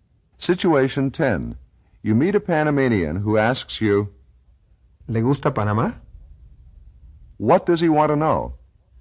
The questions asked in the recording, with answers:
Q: What does he want to know?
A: He wants to know if you like Panama.